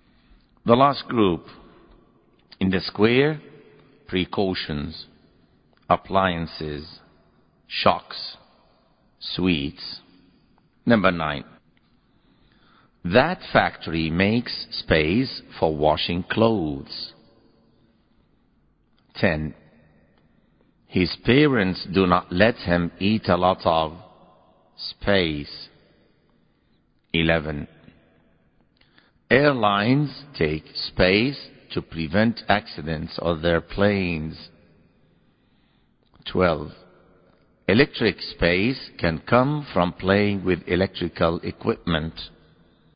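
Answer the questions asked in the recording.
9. appliances
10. sweets
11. precautions
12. shocks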